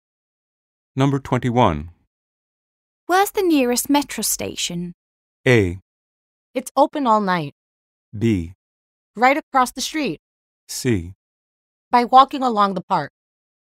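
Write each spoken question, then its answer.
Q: Where's the nearest metro station?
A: B: Right across the street.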